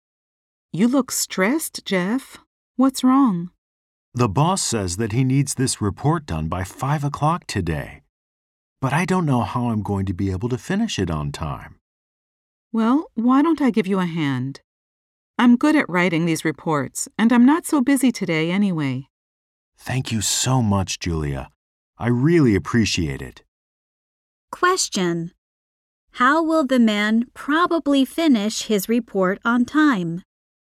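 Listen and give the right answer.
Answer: Julia will help him write it.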